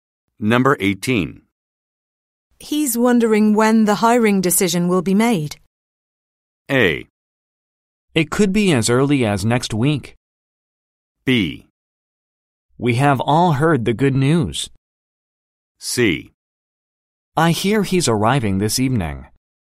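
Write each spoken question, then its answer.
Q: He's wondering when the hiring decision will be made.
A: A: It could be as early as next week.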